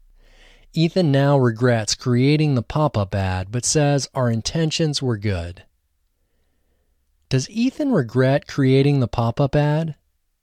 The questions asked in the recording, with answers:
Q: Does Ethan regret creating the pop-up ad?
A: Yes, Ethan regrets creating the pop-up ad.